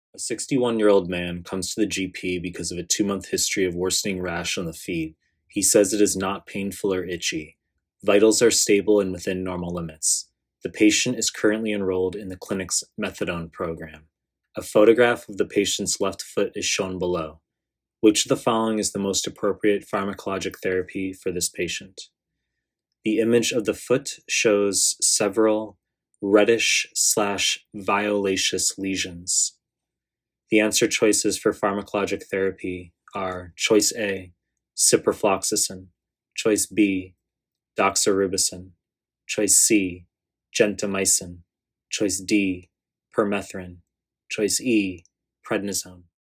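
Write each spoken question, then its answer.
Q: Which of the following is the most appropriate pharmacologic therapy for this patient?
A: B: doxorubicin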